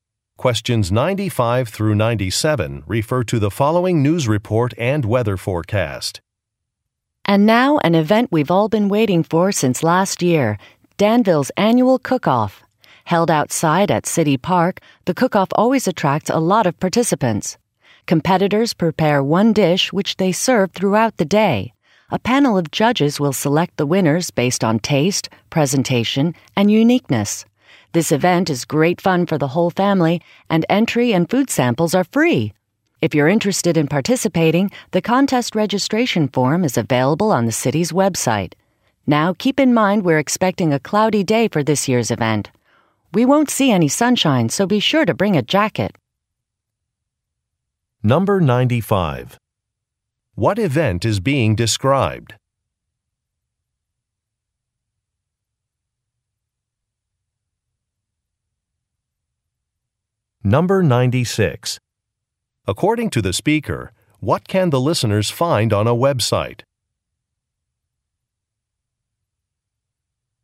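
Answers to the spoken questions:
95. A cooking competition (annual cook-off)
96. A registration form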